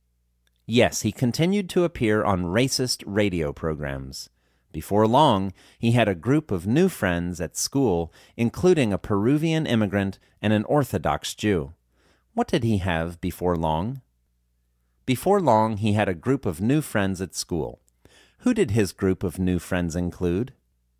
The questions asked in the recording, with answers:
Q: What did he have before long?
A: Before long, he had a group of new friends at school.

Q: Who did his group of new friends include?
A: His group of new friends included a Peruvian immigrant and an Orthodox Jew.